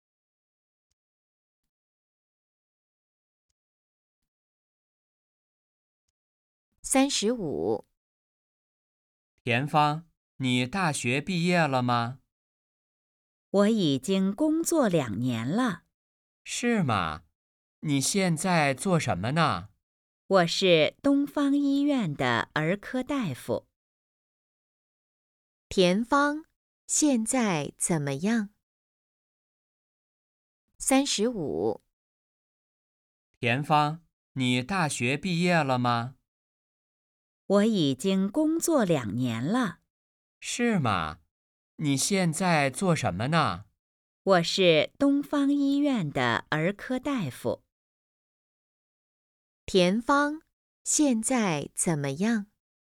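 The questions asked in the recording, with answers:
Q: 田芳现在怎么样?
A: 是东方医院的儿科大夫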